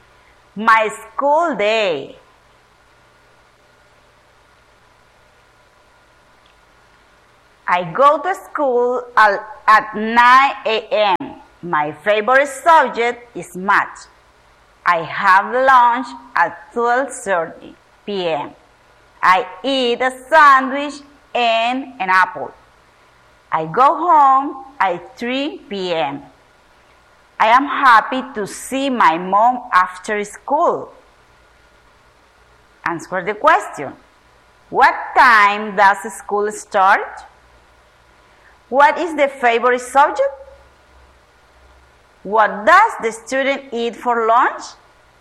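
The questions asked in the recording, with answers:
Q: What time does school start?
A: 9 a.m.

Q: What is the favorite subject?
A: Math

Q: What does the student eat for lunch?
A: A sandwich and an apple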